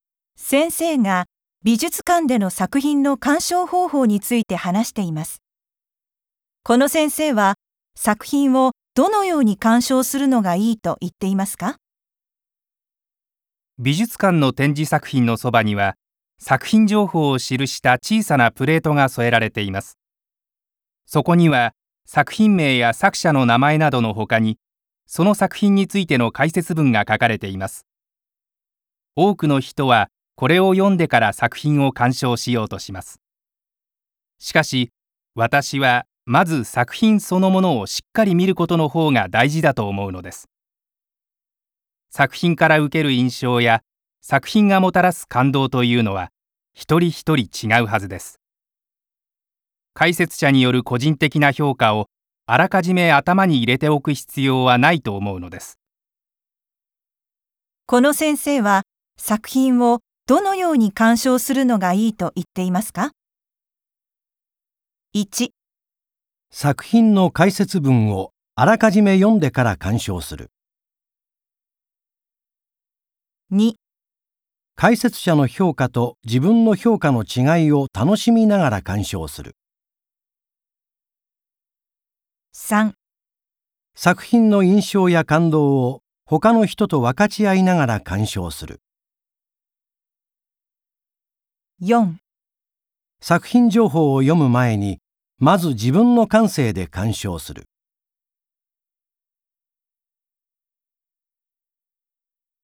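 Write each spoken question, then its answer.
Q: この先生は作品をどのように鑑賞するのがいいと言っていますか?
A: 4: 作品情報を読む前に、まず自分の感性で鑑賞する。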